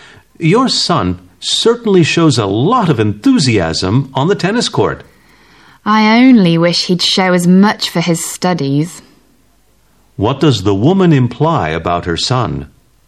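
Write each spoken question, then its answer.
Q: What does the woman imply about her son?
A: He isn't as enthusiastic about his studies as about tennis.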